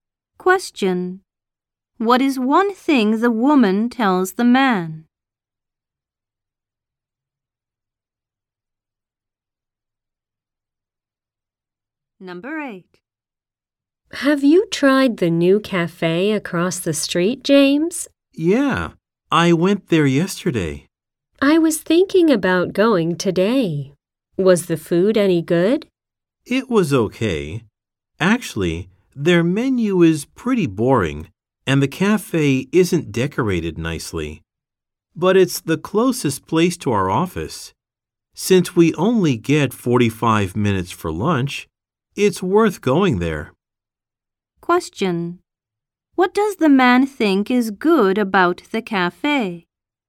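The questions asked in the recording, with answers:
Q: What does the man think is good about the cafe?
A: It's the closest place to their office.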